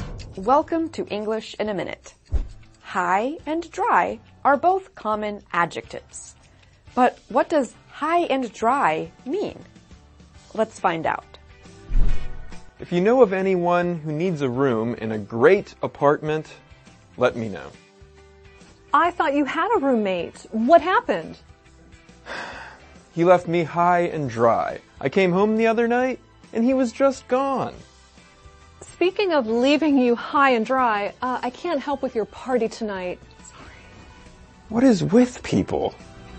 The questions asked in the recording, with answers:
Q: But what does high and dry mean?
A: High and dry means to leave someone in a tough situation or to make life difficult for them.